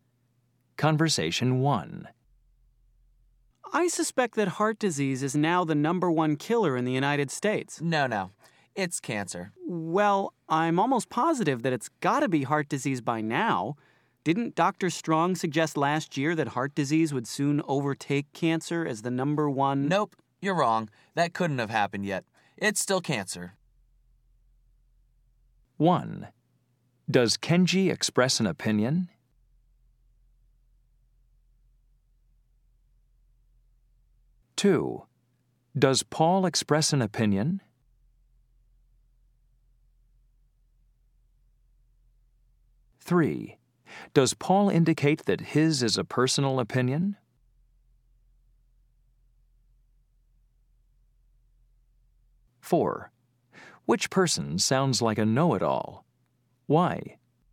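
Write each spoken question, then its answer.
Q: Does Kenji express an opinion?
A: Yes

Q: Does Paul express an opinion?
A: Yes

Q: Does Paul indicate that his is a personal opinion?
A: No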